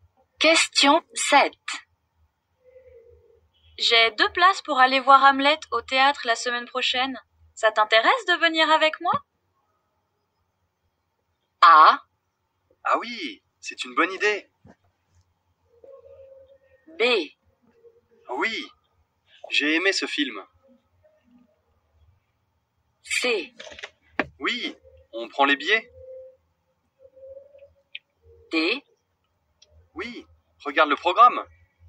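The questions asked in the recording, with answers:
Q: Ça t'intéresse de venir avec moi?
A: A: Oui, c'est une bonne idée.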